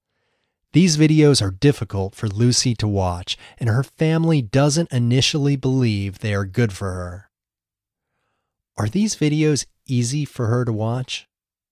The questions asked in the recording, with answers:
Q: Are these videos easy for her to watch?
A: No, they are difficult for her to watch.